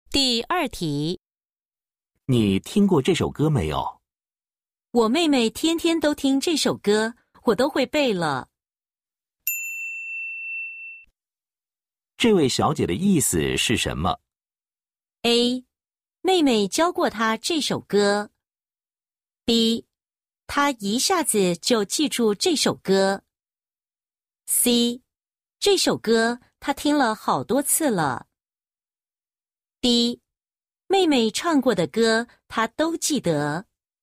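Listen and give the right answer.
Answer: C: 这首歌她听了好多次了。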